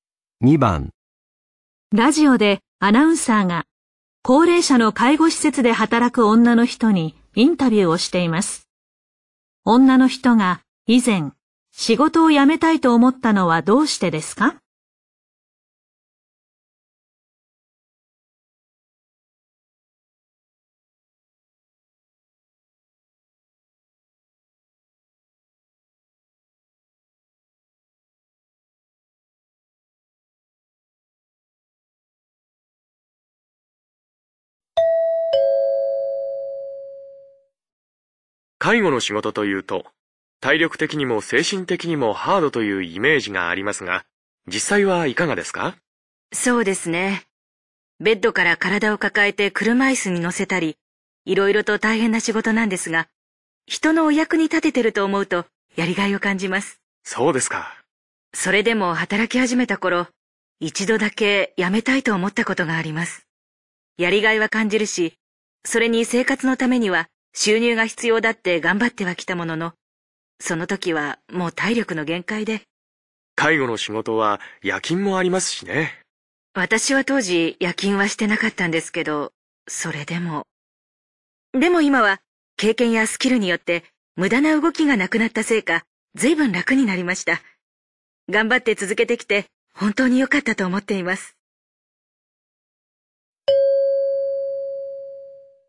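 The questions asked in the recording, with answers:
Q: 女の人が以前仕事を辞めたいと思ったのはどうしてですか?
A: 体力の限界だったから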